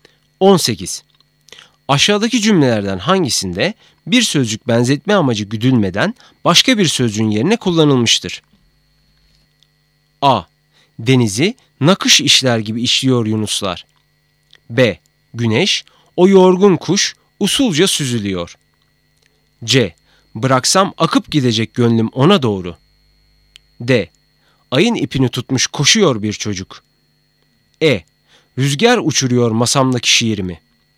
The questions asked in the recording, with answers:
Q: Aşağıdaki cümlelerden hangisinde bir sözcük benzetme amacı güdülmeden başka bir sözcüğün yerine kullanılmıştır?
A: Doğru cevap E.